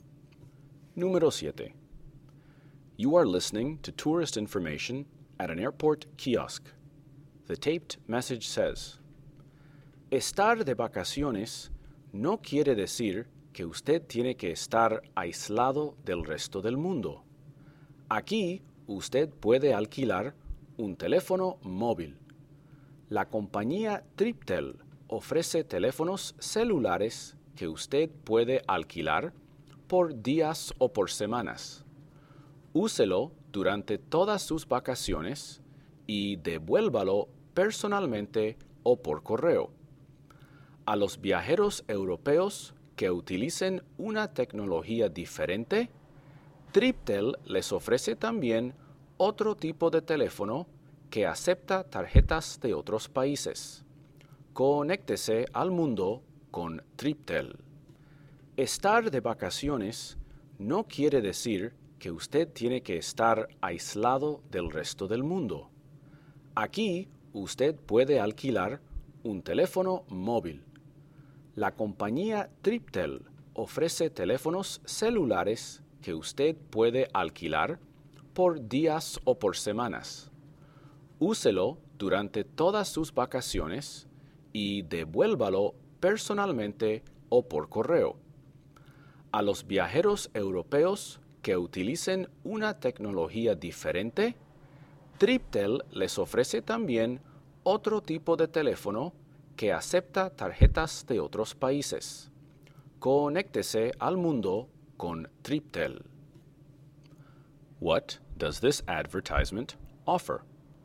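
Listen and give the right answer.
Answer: Cell phone rentals by the day or week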